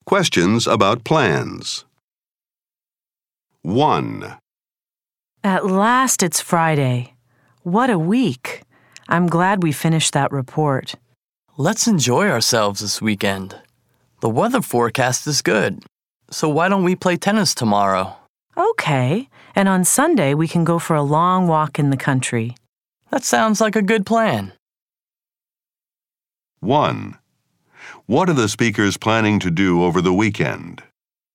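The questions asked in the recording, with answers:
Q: What are the speakers planning to do over the weekend?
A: Play tennis on Saturday and go for a long walk in the country on Sunday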